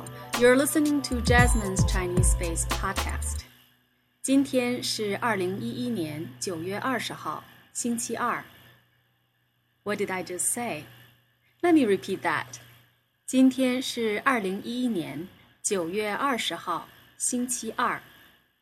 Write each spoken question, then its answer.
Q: What did I just say?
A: Today is Tuesday, September 20th, 2011.